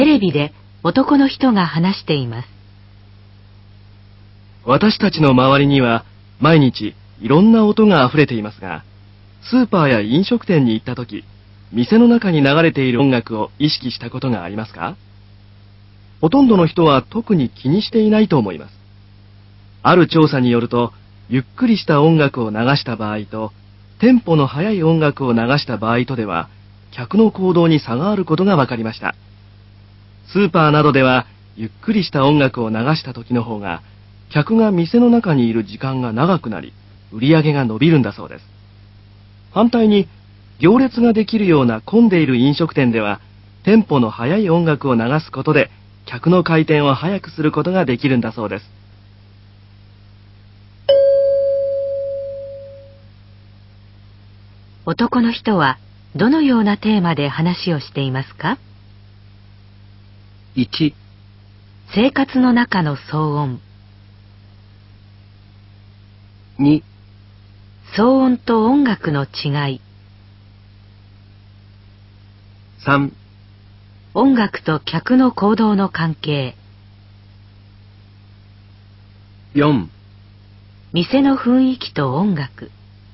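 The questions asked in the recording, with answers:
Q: 男の人はどのようなテーマで話をしていますか?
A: 3: 音楽と客の行動の関係。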